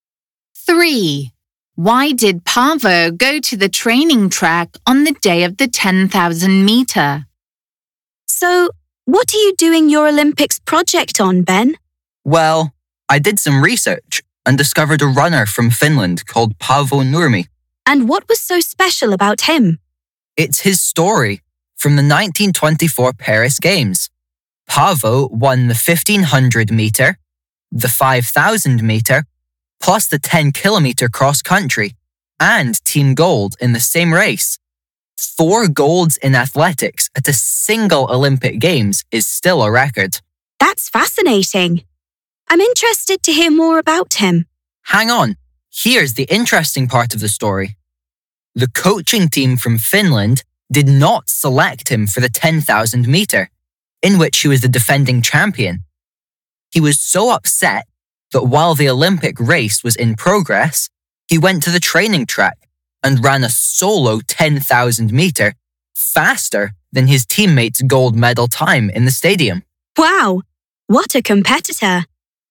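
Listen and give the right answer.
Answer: He was upset at not being selected, so he ran a solo 10,000 m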